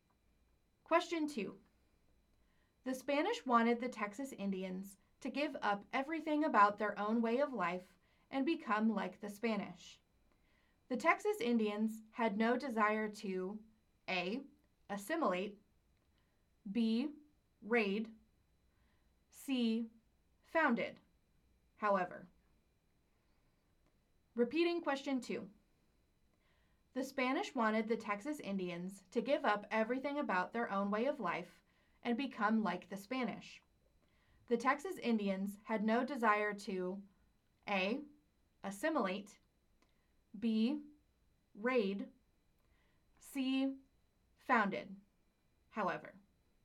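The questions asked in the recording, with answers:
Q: The Spanish wanted the Texas Indians to give up everything about their own way of life and become like the Spanish. The Texas Indians had no desire to A. assimilate, B. raid, C. founded, however.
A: A: assimilate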